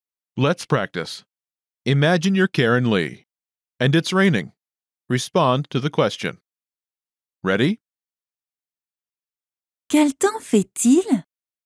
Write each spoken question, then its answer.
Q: Quel temps fait-il?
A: Il pleut.